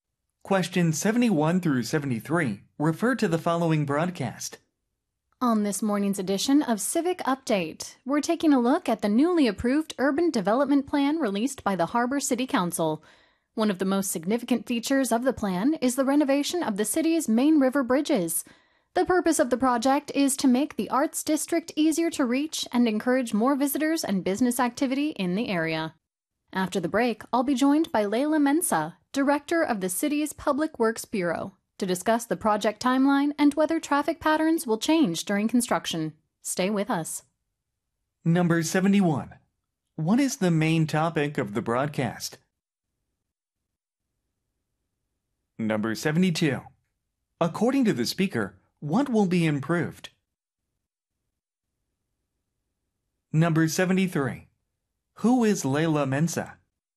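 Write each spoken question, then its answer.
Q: What is the main topic of the broadcast?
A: A newly approved urban development plan

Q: According to the speaker, what will be improved?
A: The city's main river bridges

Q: Who is Leila Mensa?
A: Director of the city's Public Works Bureau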